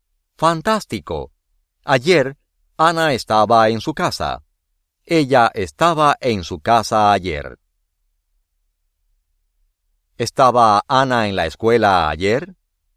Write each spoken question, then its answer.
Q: ¿Estaba Ana en la escuela ayer?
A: No.